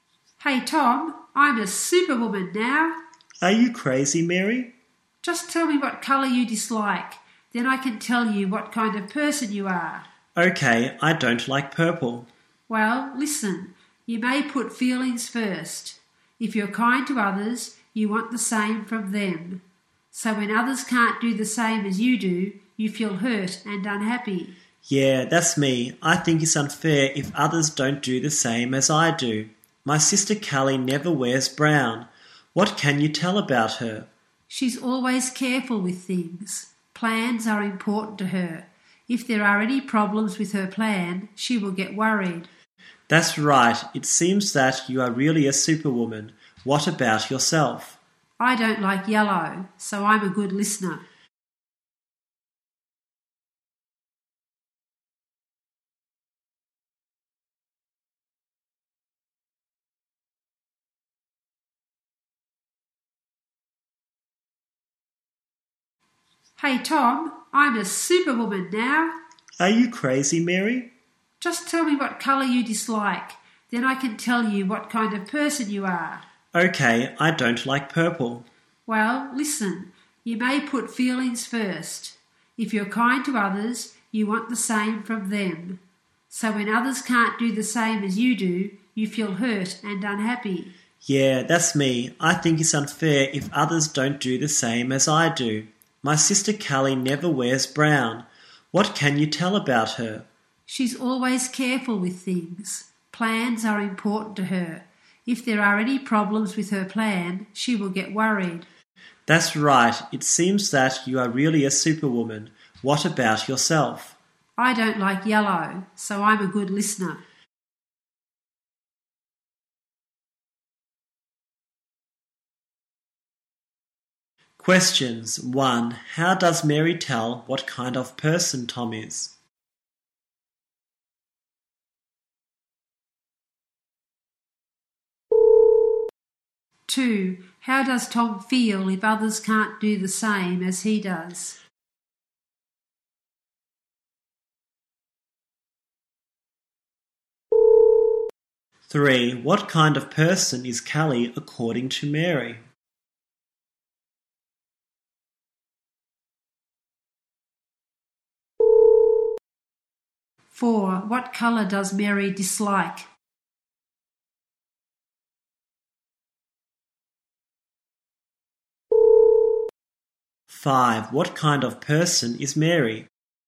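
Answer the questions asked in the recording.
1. By asking what colour he dislikes
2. Hurt and unhappy
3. Careful; plans are important to her
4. Yellow
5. A good listener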